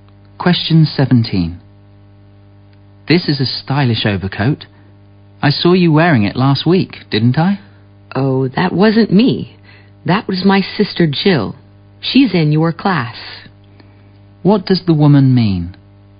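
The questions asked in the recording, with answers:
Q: What does the woman mean?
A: The man saw her sister Jill, not her, wearing the coat.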